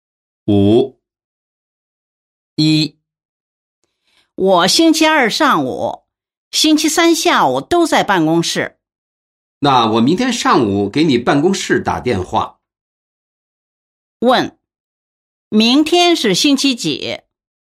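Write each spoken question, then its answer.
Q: 明天是星期几?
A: 星期二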